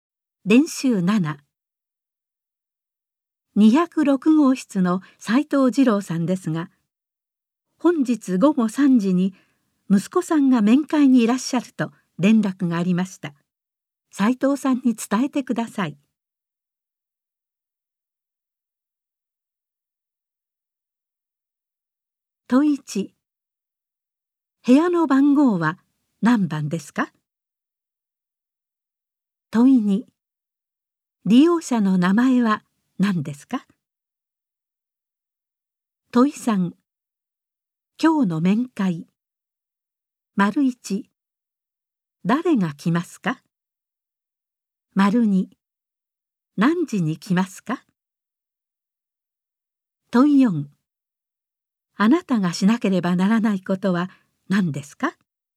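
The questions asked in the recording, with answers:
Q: 部屋の番号は何番ですか?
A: 206号室

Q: 利用者の名前は何ですか?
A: 斉藤二郎さん

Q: 今日の面会。丸1。誰が来ますか?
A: 息子さん

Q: 何時に来ますか?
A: 午後3時

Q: あなたがしなければならないことは何ですか?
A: 斉藤さんに息子さんの面会を伝えること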